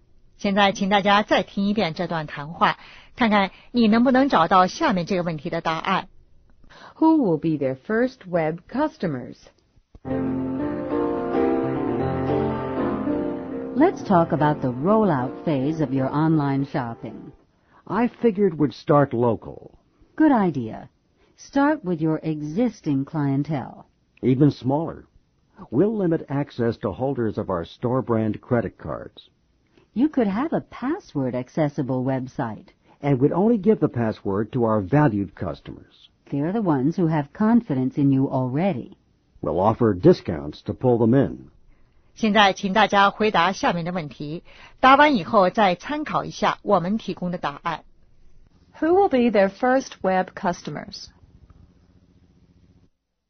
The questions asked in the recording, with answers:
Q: Who will be their first web customers?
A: The existing clientele with their credit cards.